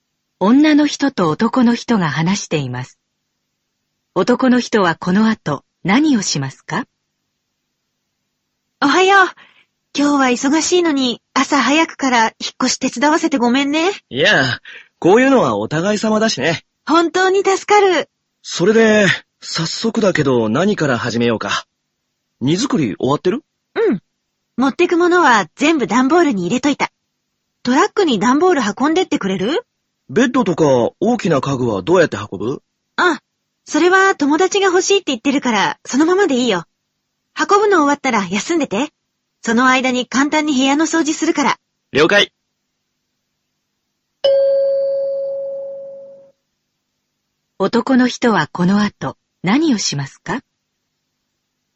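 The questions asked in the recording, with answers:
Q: 男の人はこの後何をしますか?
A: 段ボールをトラックに運ぶ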